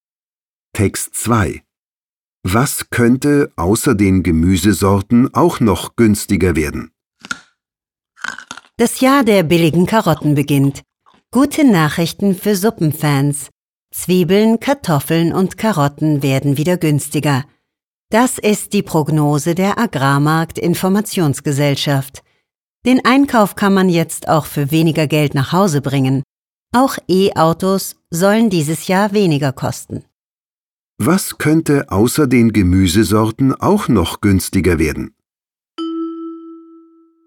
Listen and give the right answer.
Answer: Man sagt, dass wahrscheinlich auch E-Autos dieses Jahr weniger kosten.